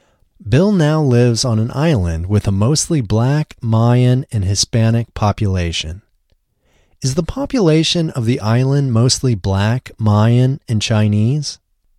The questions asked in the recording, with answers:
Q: Is the population of the island mostly black, Mayan, and Chinese?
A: No, the population of the island isn't mostly black, Mayan, and Chinese.